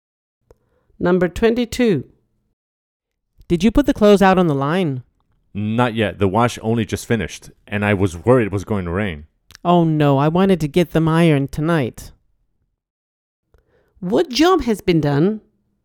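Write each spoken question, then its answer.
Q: What job has been done?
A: the washing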